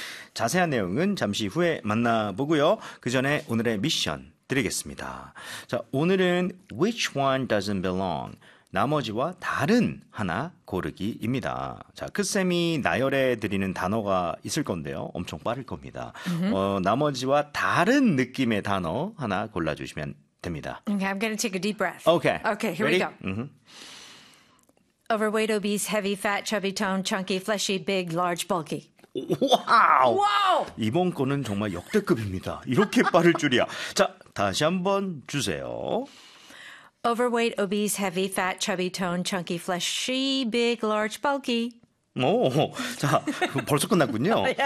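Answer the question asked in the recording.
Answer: toned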